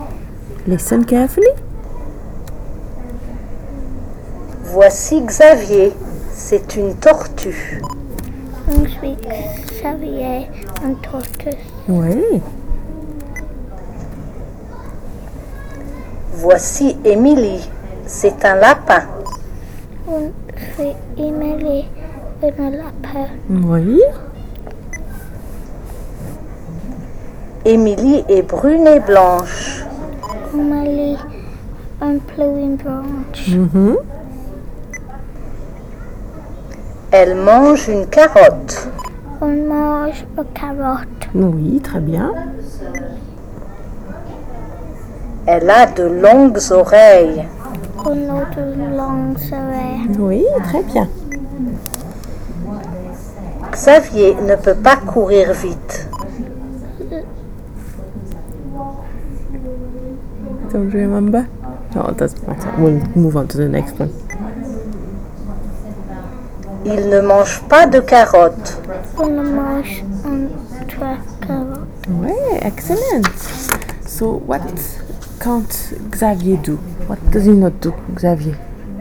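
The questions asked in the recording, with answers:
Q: So, what can't Xavier do?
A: Run fast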